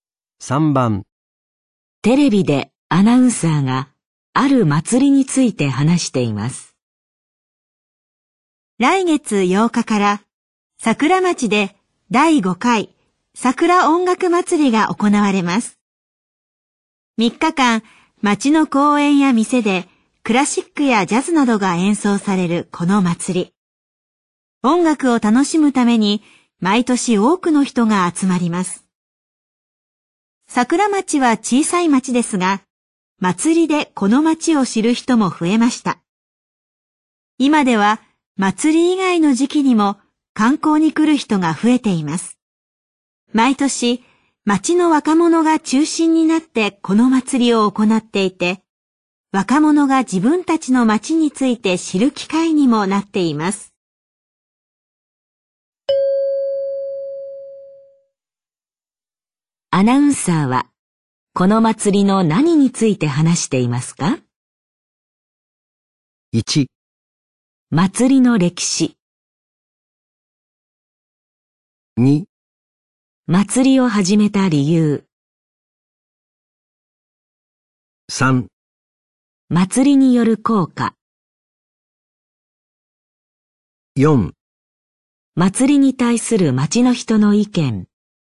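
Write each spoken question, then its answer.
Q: アナウンサーは、この祭りの何について話していますか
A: 3: 祭りによる効果。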